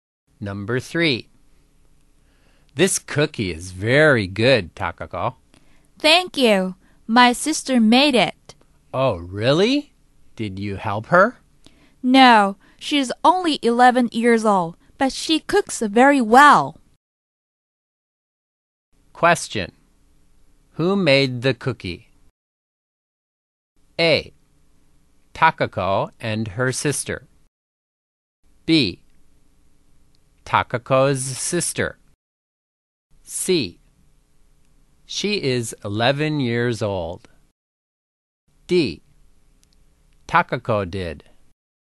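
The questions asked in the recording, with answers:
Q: Who made the cookie?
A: B: Takako's sister.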